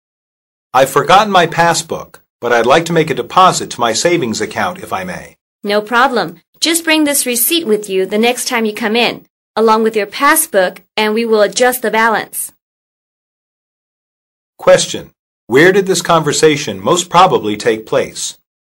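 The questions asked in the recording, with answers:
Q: Where did this conversation most probably take place?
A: At a bank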